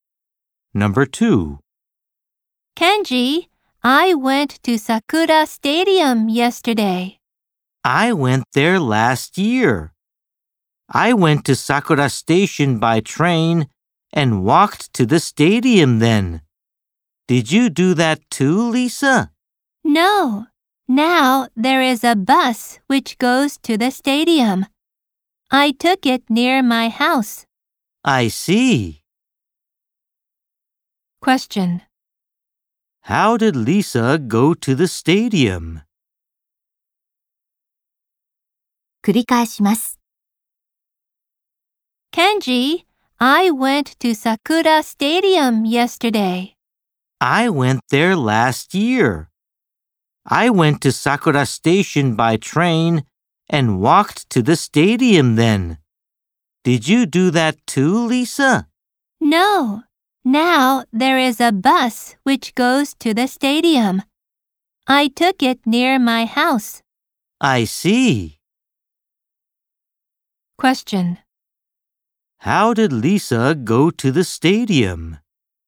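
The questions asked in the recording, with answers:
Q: How did Lisa go to the stadium?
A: By bus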